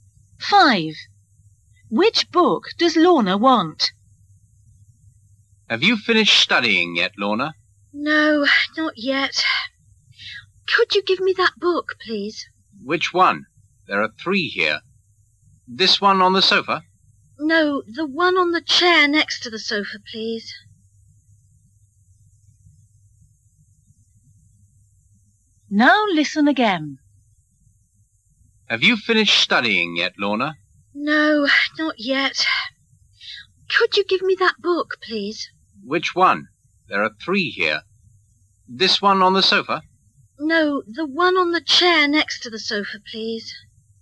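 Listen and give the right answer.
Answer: The one on the chair next to the sofa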